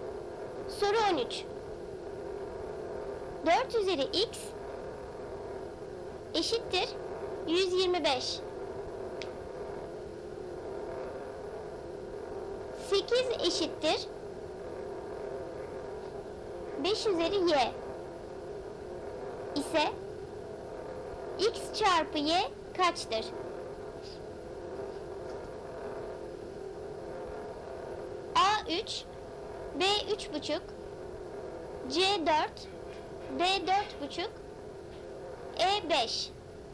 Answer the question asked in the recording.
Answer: Doğru cevap D 4,5.